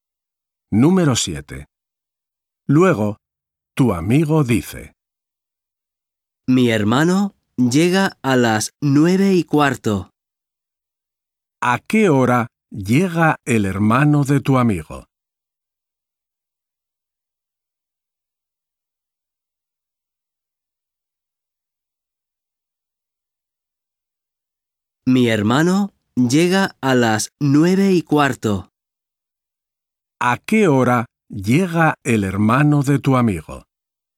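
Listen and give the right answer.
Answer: a las 9:15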